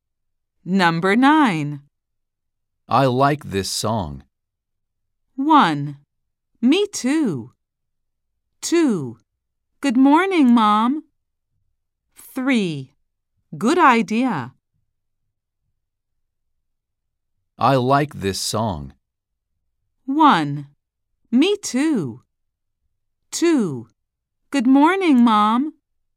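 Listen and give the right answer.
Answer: 1: Me too.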